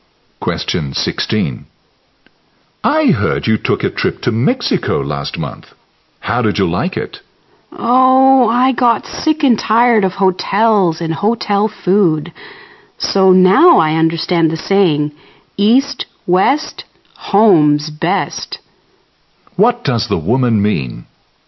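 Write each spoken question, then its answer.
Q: What does the woman mean?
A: She prefers being at home to traveling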